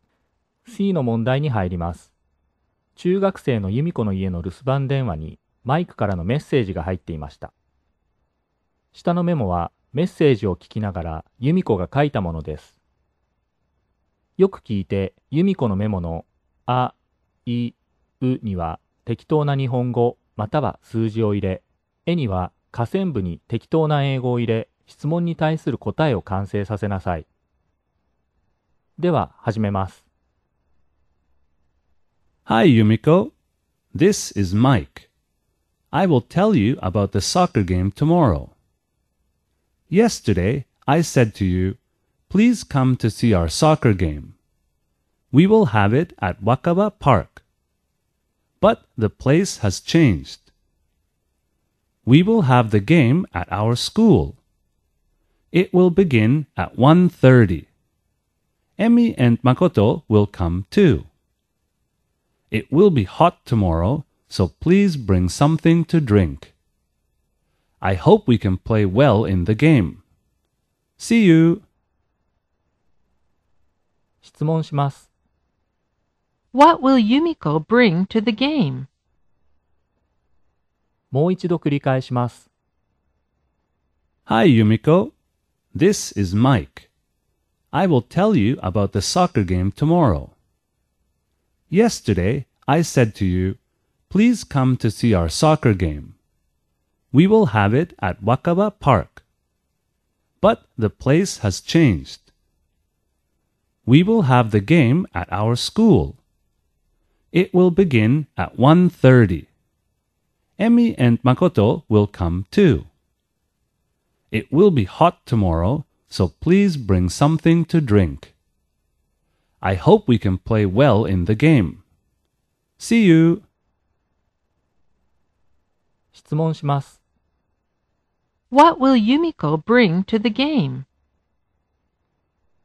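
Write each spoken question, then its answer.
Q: What will Yumiko bring to the game?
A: Something to drink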